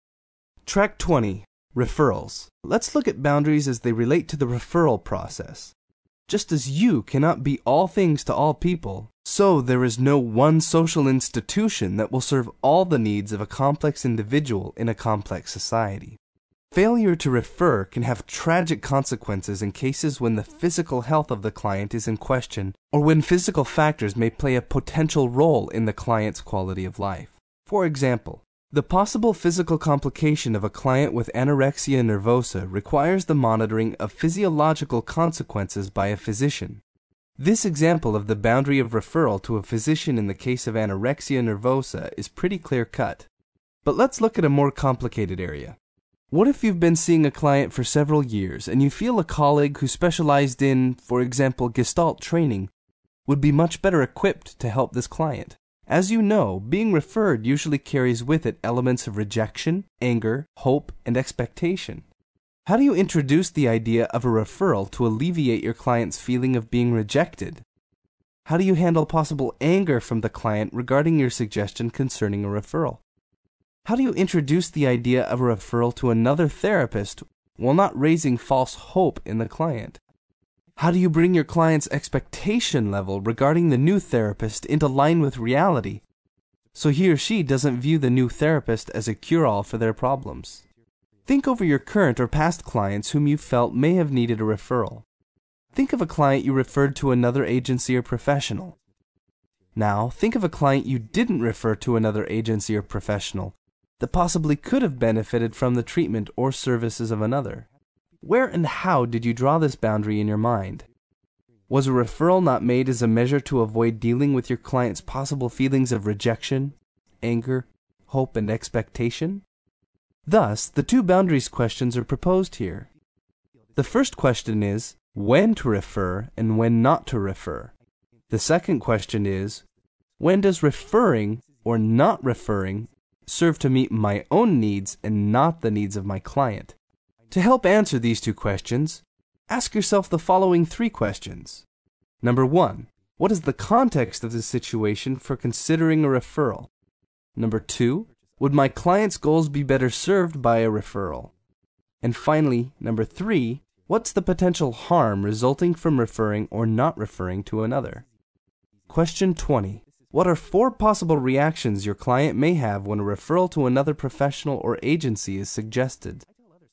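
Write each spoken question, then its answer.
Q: What are four possible reactions your client may have when a referral to another professional or agency is suggested?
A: Rejection, anger, hope, and expectation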